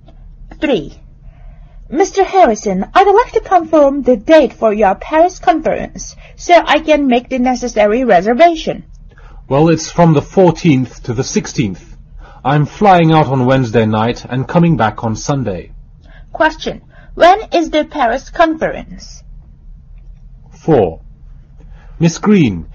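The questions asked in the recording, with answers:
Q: When is the Paris conference?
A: From the 14th to the 16th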